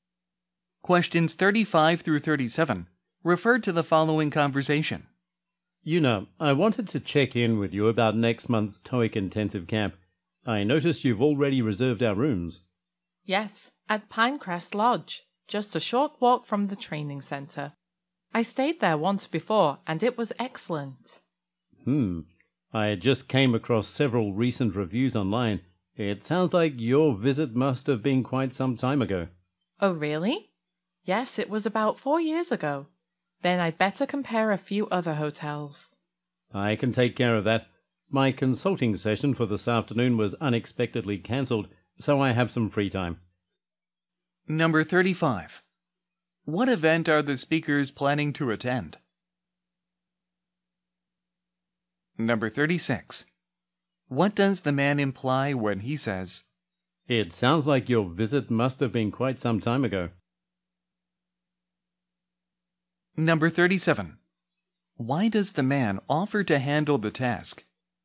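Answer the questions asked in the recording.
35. A TOEIC intensive camp
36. The lodge may no longer be as good as it was
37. His afternoon consulting session was cancelled, so he has free time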